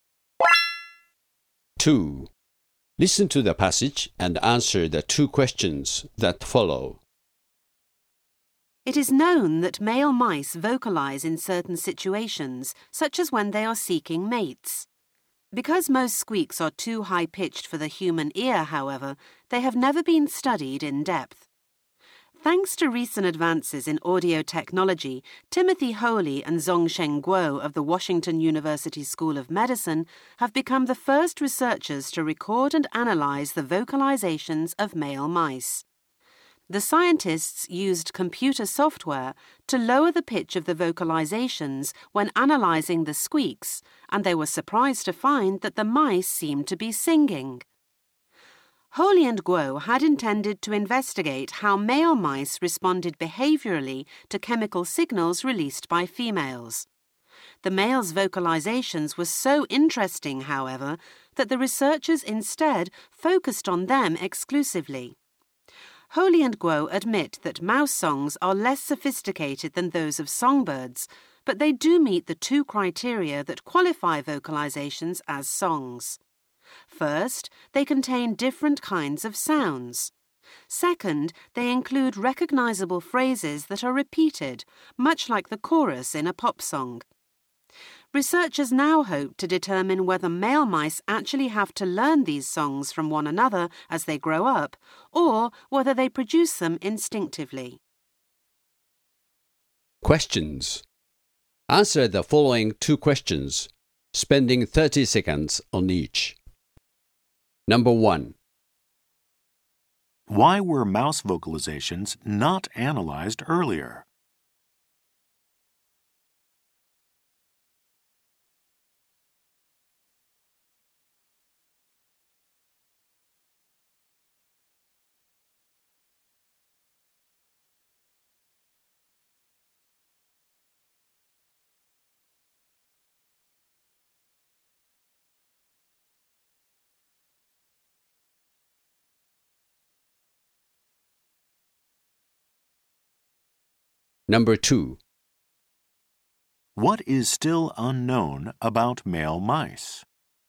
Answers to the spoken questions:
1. The technology needed to analyze the high pitched vocalizations of the mice was unavailable until recently.
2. Researchers are still unsure as to whether male mice learn the tunes from other mice or know them instinctively.